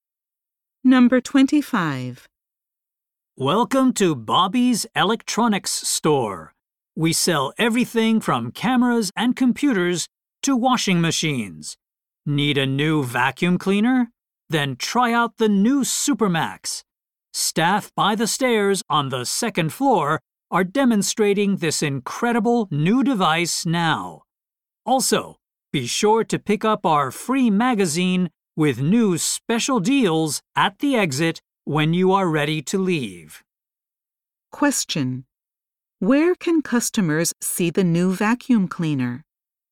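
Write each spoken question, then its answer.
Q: Where can customers see the new vacuum cleaner?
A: By the stairs on the second floor.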